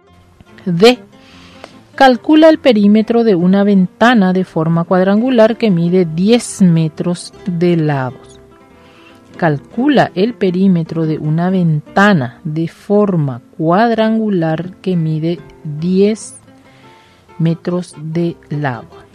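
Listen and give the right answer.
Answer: 40 metros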